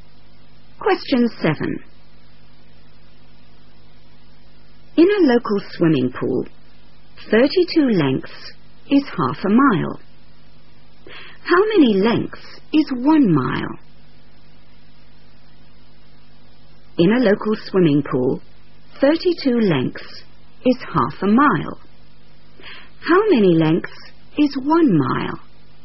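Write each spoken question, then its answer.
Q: How many lengths is 1 mile?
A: 64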